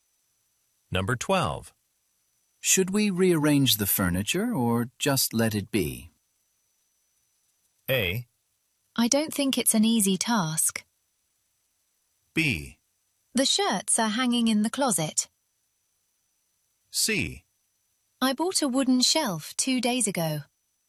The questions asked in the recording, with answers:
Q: Should we rearrange the furniture or just let it be?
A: I don't think it's an easy task.